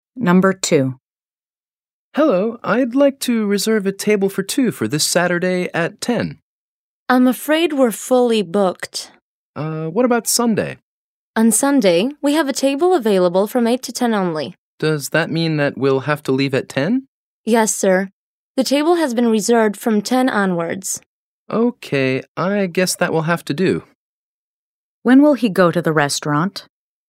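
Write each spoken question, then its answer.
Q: When will he go to the restaurant?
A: On Sunday, from 8 to 10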